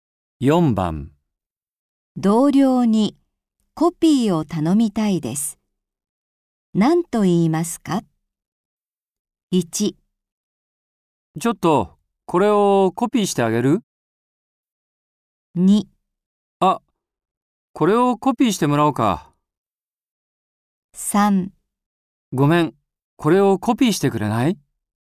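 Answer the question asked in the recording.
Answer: 3: ごめん、これをコピーしてくれない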